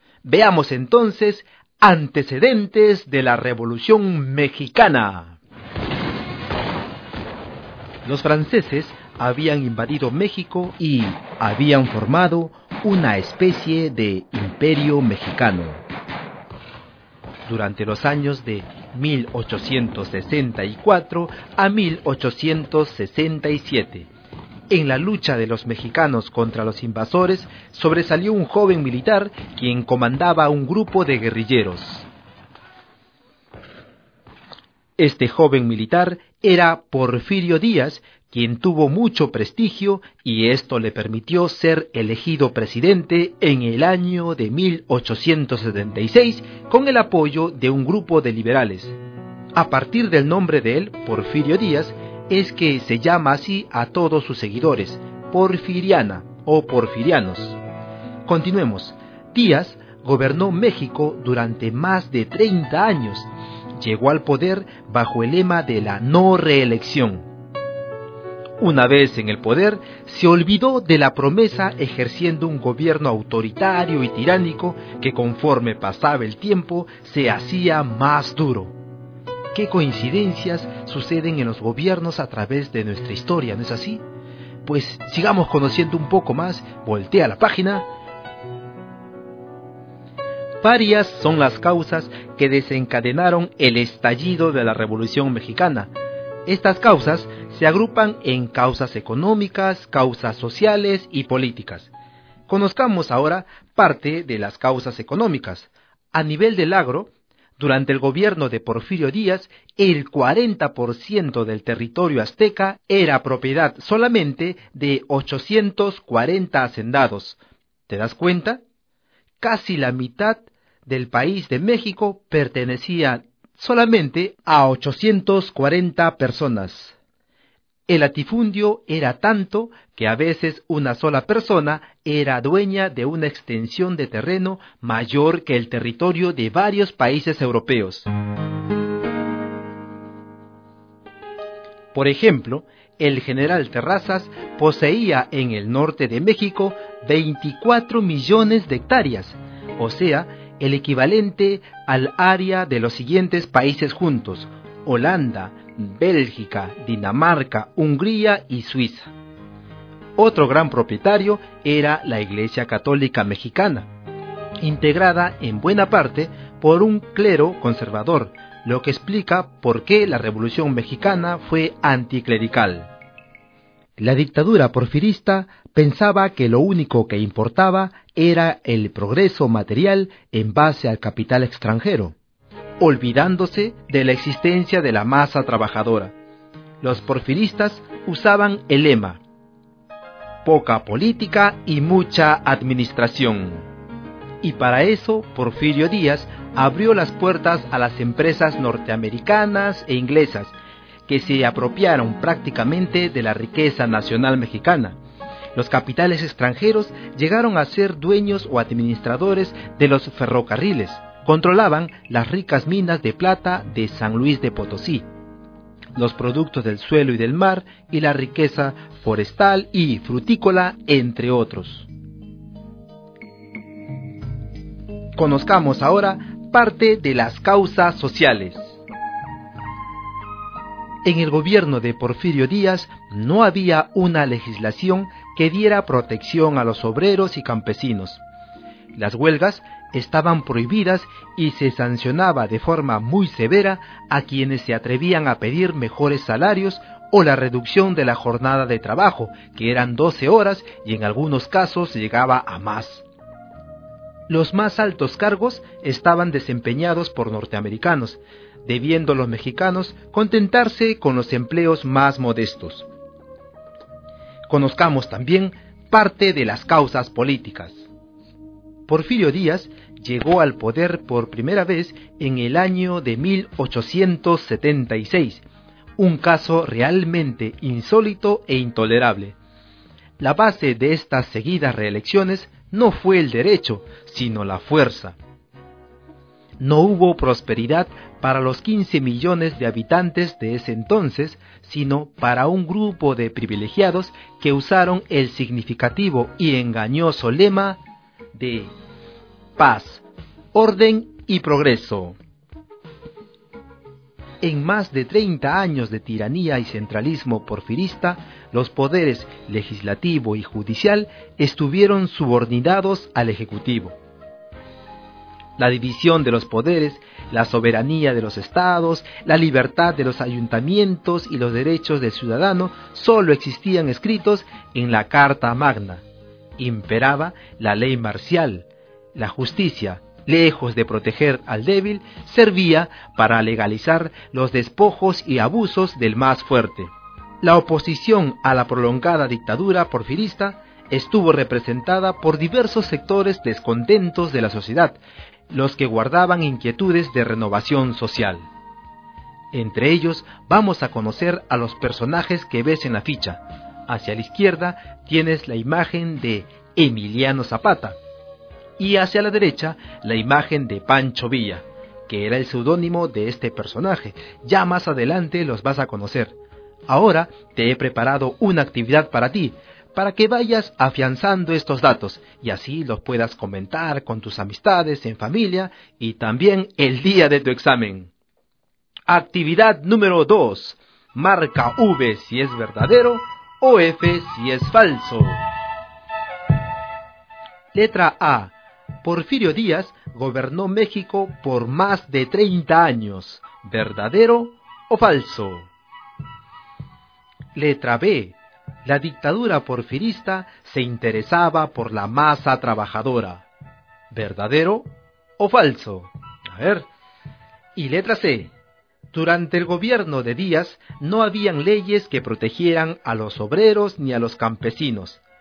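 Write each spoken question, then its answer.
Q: Porfirio Díaz gobernó México por más de 30 años.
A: Verdadero

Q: La dictadura porfirista se interesaba por la masa trabajadora.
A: Falso

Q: Durante el gobierno de Díaz no habían leyes que protegieran a los obreros ni a los campesinos.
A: Verdadero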